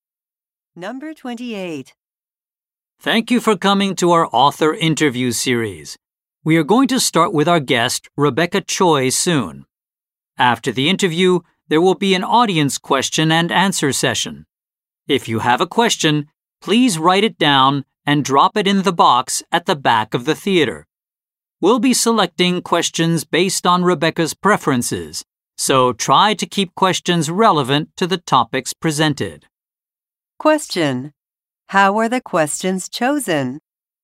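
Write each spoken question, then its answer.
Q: How were the questions chosen?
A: Based on Rebecca's preferences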